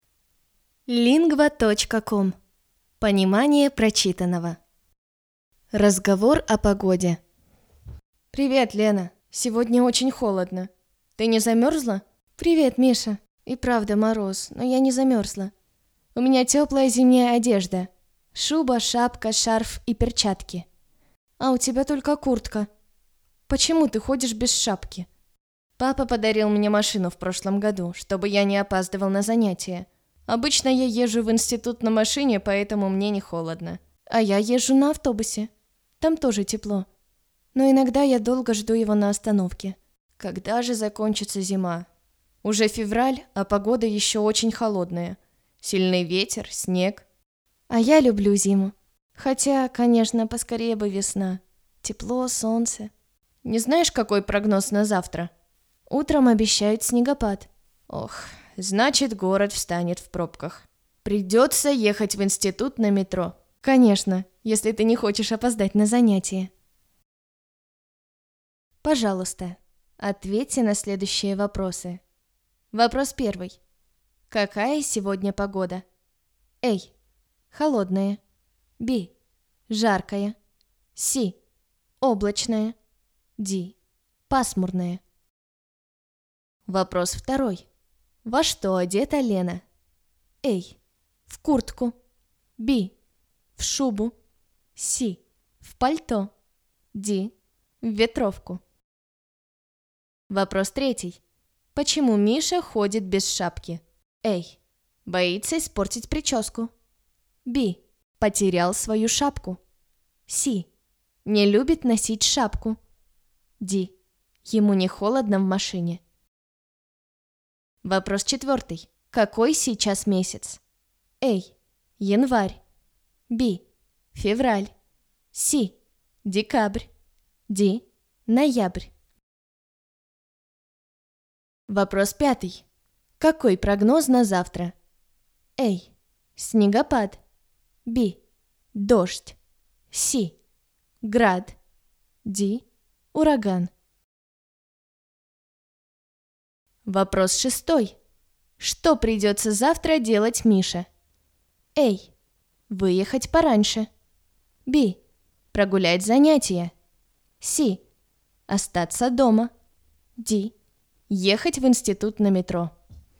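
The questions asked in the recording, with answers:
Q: Какая сегодня погода?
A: A: Холодная.

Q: Во что одета Лена?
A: B: В шубу.

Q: Почему Миша ходит без шапки?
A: D: Ему не холодно в машине.

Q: Какой сейчас месяц?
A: B: Февраль.

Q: Какой прогноз на завтра?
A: A: Снегопад.

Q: Что придется завтра делать Мише?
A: D: Ехать в институт на метро.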